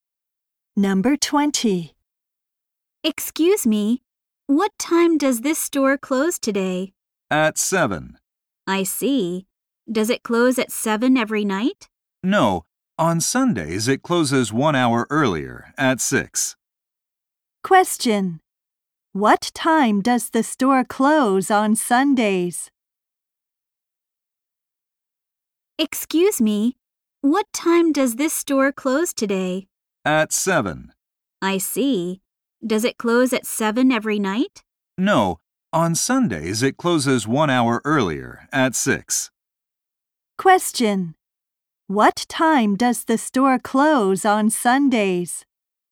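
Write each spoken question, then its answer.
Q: What time does the store close on Sundays?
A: At 6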